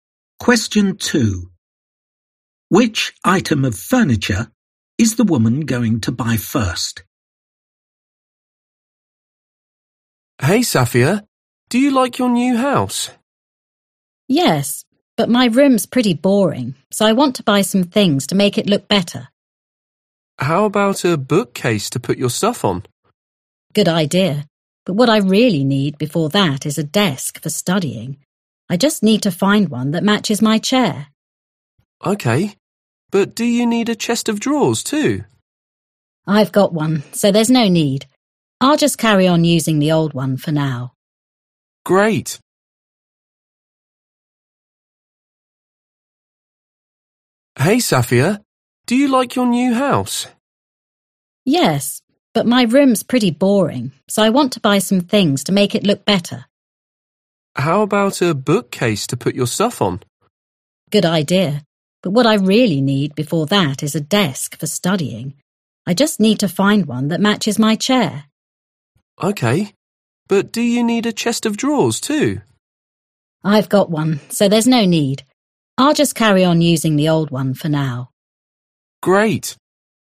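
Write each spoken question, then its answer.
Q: Which item of furniture is the woman going to buy first?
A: a desk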